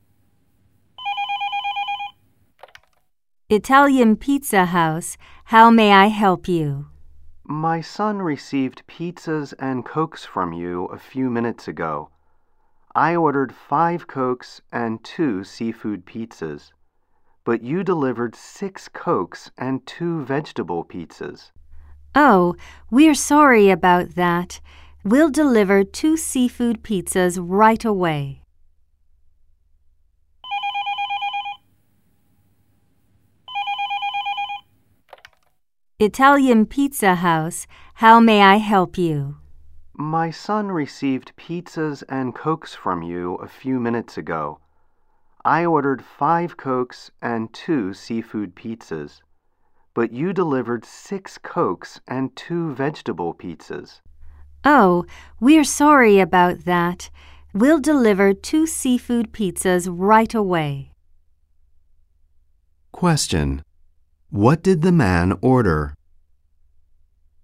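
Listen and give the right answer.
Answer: 5 Cokes and 2 seafood pizzas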